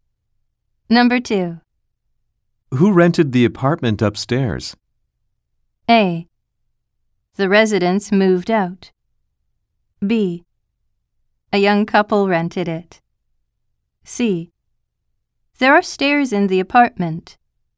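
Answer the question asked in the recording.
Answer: B: A young couple rented it.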